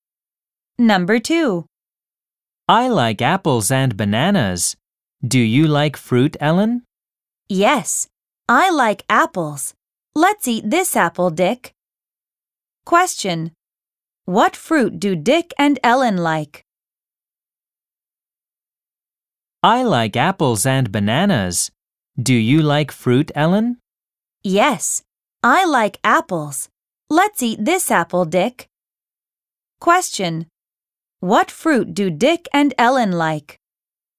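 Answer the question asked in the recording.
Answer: Apples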